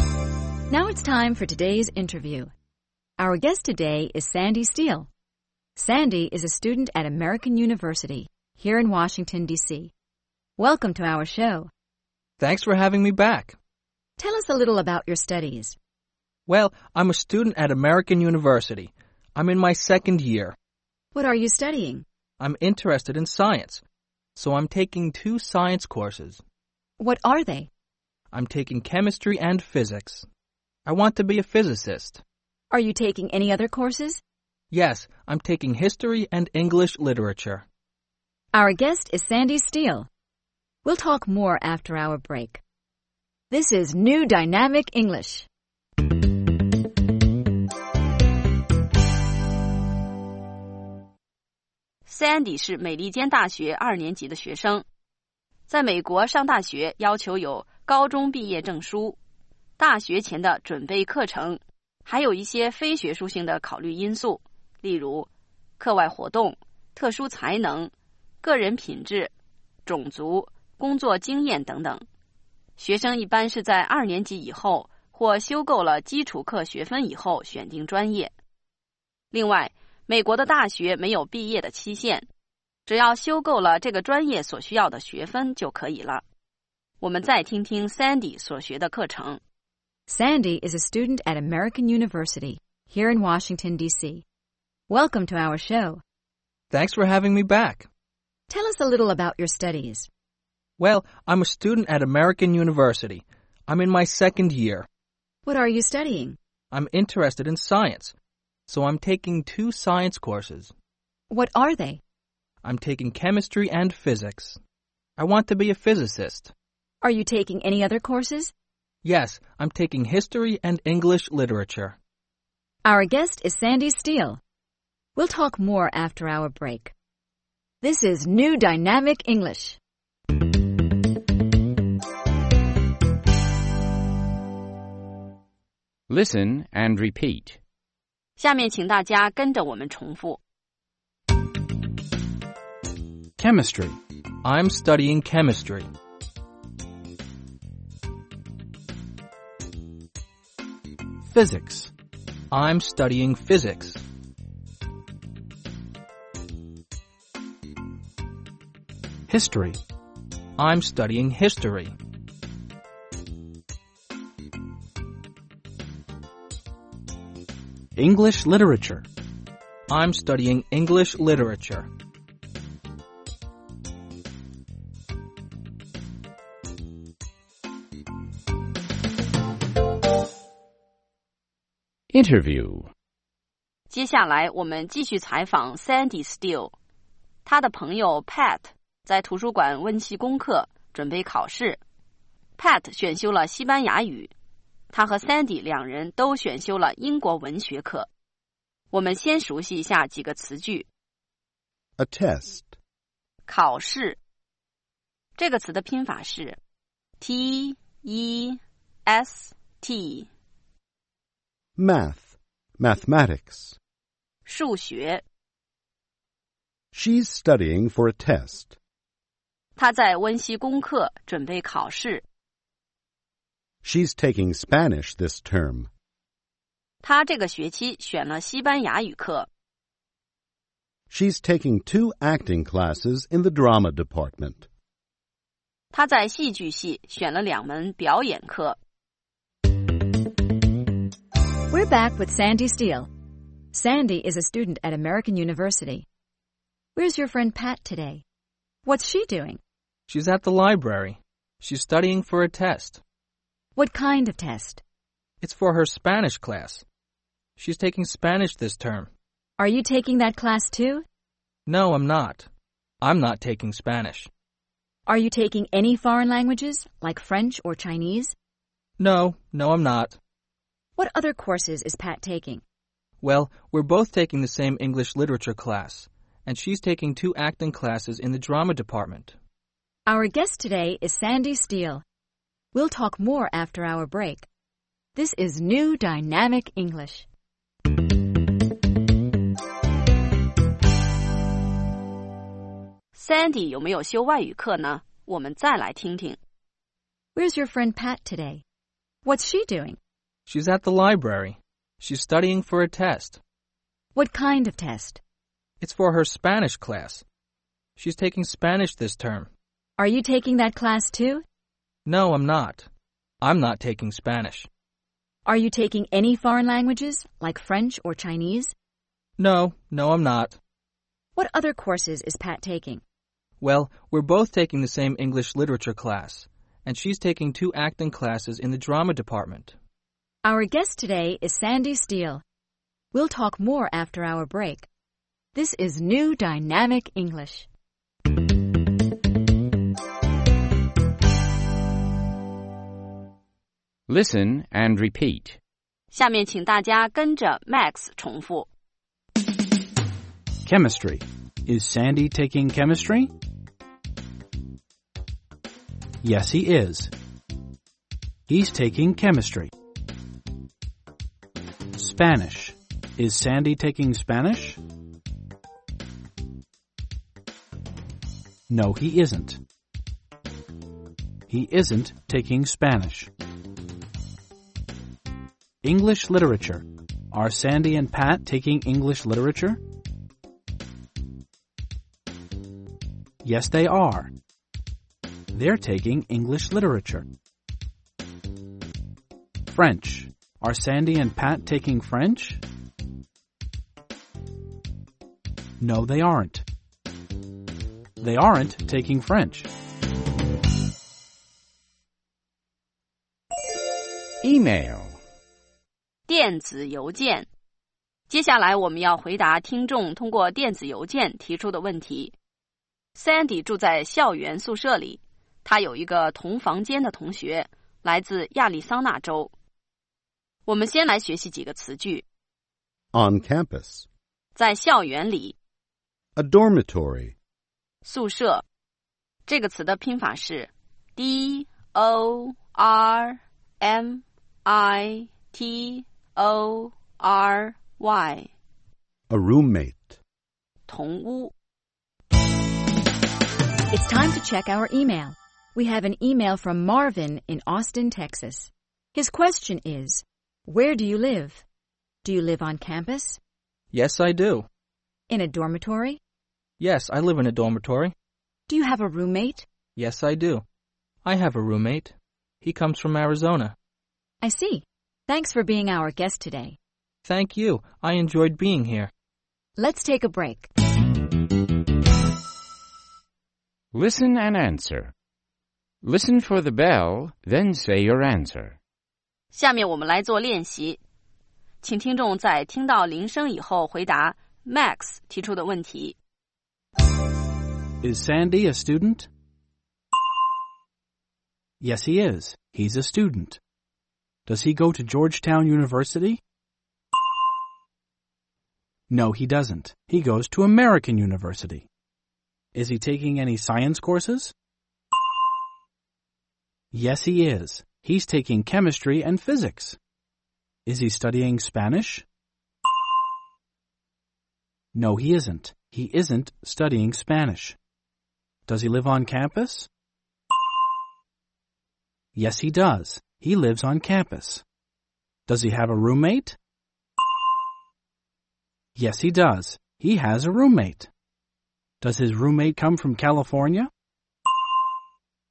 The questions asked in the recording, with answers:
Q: Is Sandy a student?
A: Yes, he is. He's a student.

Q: Does he go to Georgetown University?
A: No, he doesn't. He goes to American University.

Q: Is he taking any science courses?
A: Yes, he is. He's taking chemistry and physics.

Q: Is he studying Spanish?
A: No, he isn't. He isn't studying Spanish.

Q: Does he have a roommate?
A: Yes, he does.

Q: Does his roommate come from California?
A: No, he doesn't. Sandy's roommate comes from Arizona.